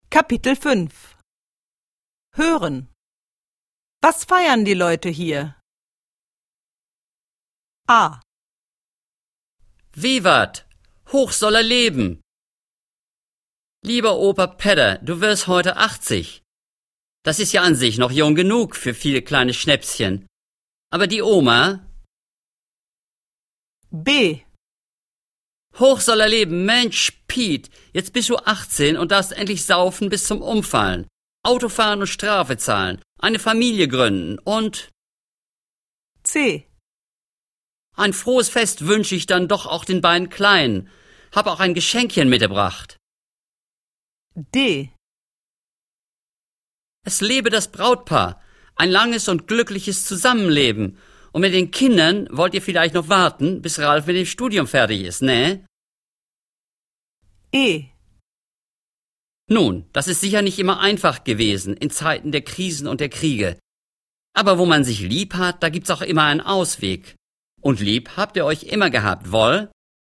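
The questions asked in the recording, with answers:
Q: Was feiern die Leute hier?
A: Opas 80. Geburtstag

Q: Was feiern die Leute hier?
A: Piets 18. Geburtstag

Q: Was feiern die Leute hier?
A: eine Hochzeit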